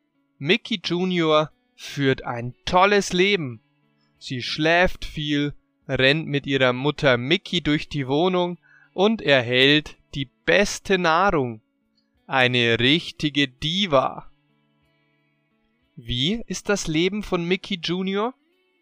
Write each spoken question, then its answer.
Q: Wie ist das Leben von Mickey Jr.?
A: Toll. Sie führt ein tolles Leben.